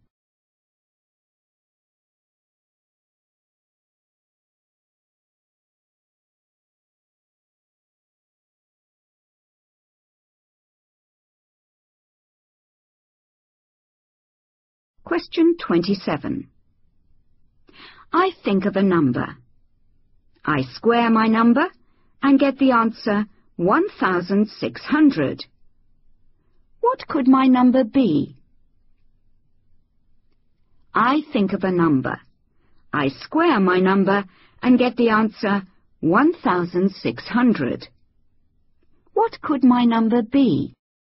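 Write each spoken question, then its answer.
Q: What could my number be?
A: 40 (or −40)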